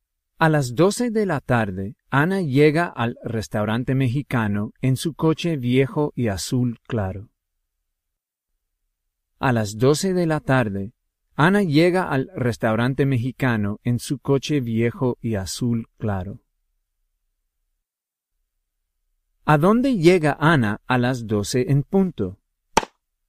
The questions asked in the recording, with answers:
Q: ¿A dónde llega Ana a las 12 en punto?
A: Ana llega al restaurante mexicano a las 12 en punto.